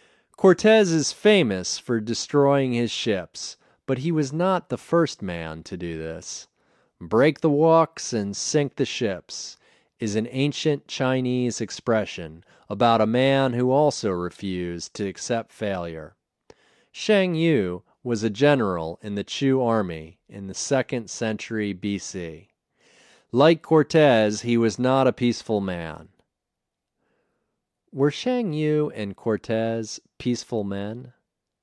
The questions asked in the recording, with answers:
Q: Were Sheng Yu and Cortez peaceful men?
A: No, they were not peaceful men.